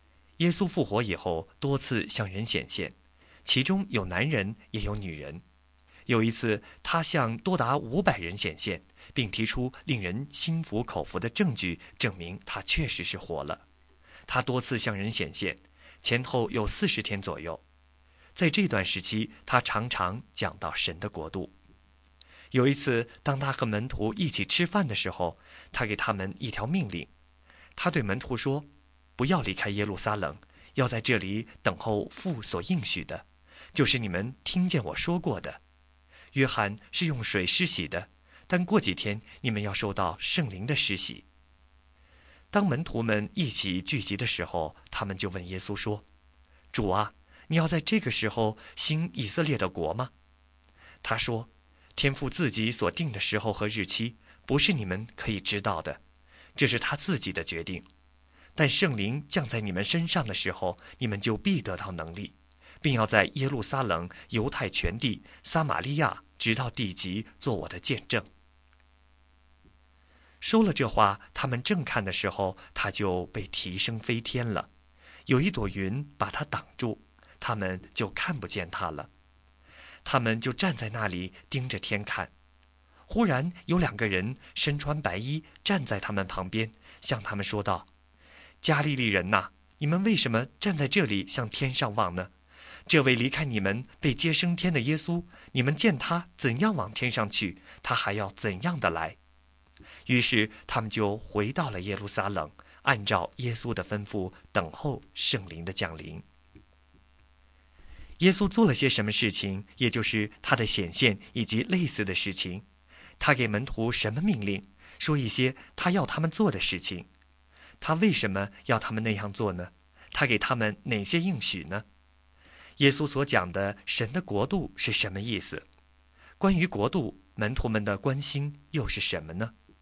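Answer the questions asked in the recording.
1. 不要离开耶路撒冷,要等候父所应许的圣灵
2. 几天后要受圣灵的施洗,圣灵降临时必得到能力;耶稣还要再来
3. 主是否要在这个时候复兴以色列国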